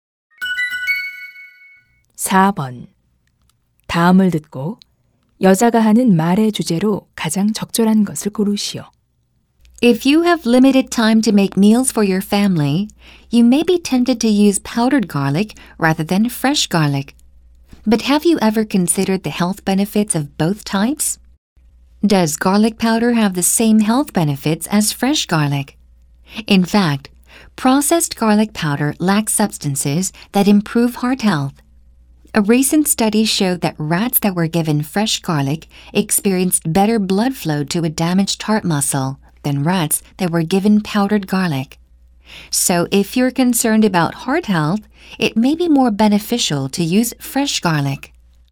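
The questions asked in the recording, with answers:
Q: 다음을 듣고 여자가 하는 말의 주제로 가장 적절한 것을 고르시오.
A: 심장 건강에는 마늘 가루보다 생마늘이 더 이롭다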